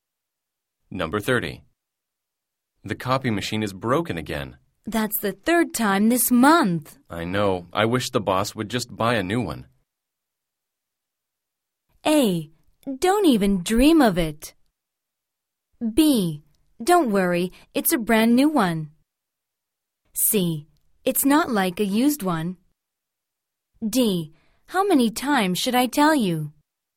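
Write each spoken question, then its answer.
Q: I know. I wish the boss would just buy a new one.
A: A: Don't even dream of it.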